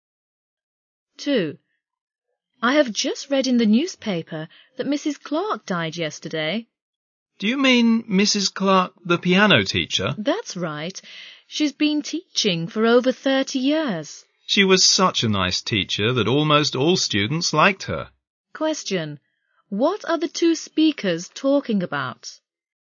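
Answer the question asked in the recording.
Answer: The death of Mrs. Clark, the piano teacher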